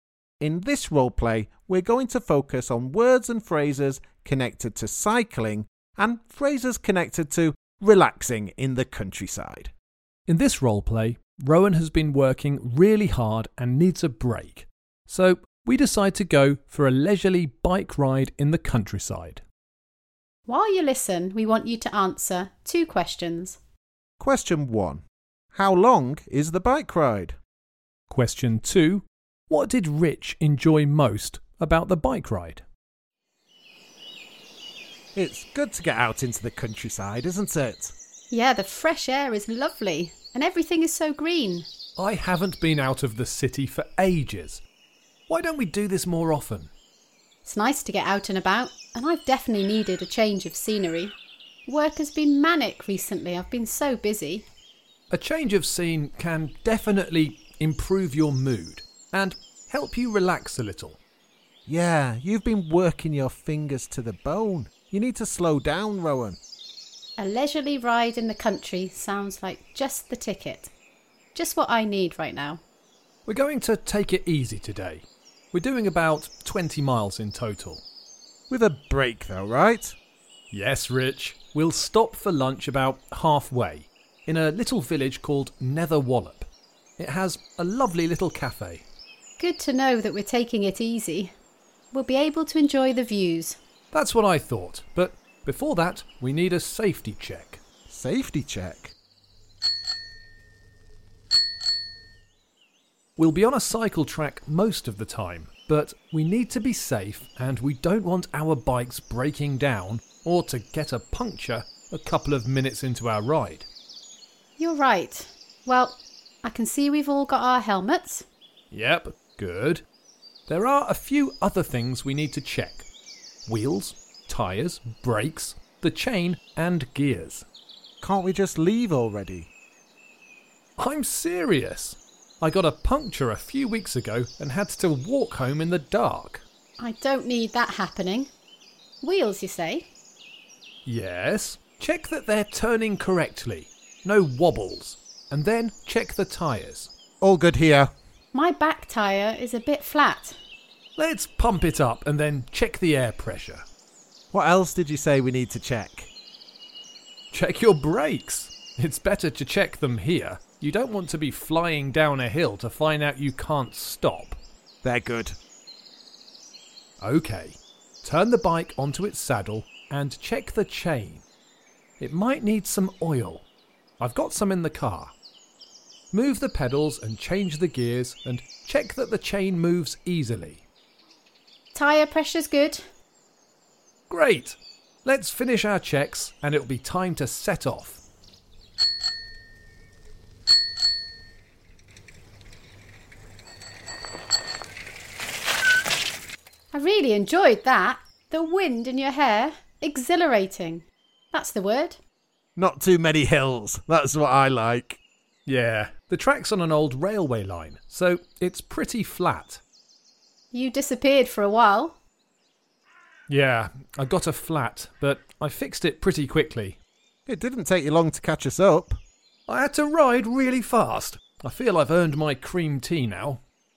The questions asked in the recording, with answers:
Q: Question one, how long is the bike ride?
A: The answer is 20 miles in total.